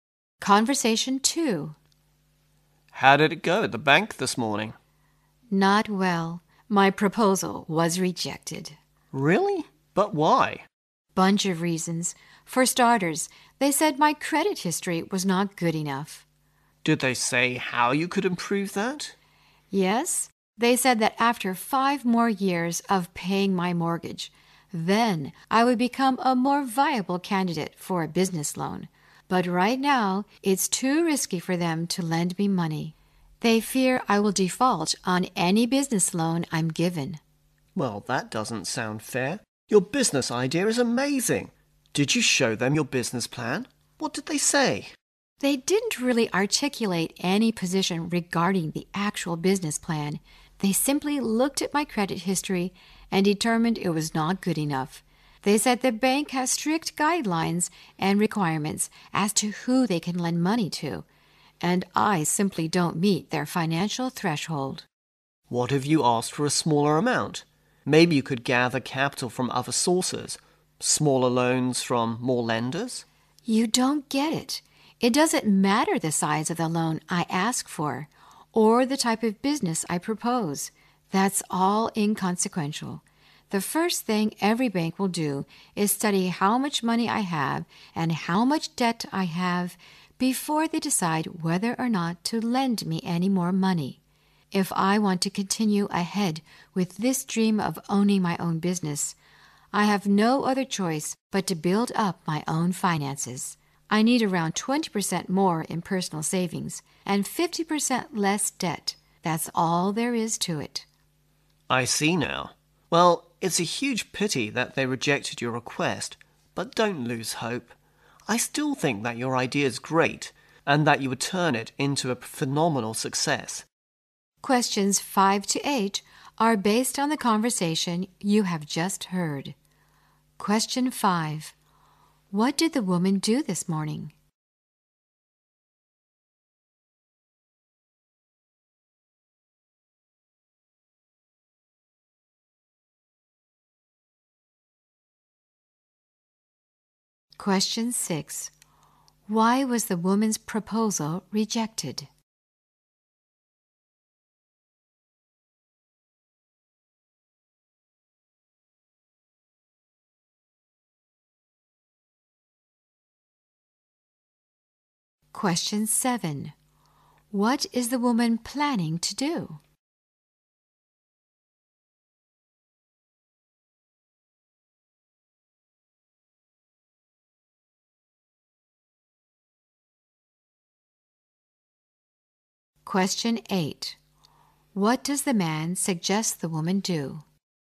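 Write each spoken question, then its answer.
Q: What did the woman do this morning?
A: She went to the bank to apply for a business loan.

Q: Why was the woman's proposal rejected?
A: Her credit history was not good enough.

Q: What is the woman planning to do?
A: Build up her own finances: save more and cut her debt.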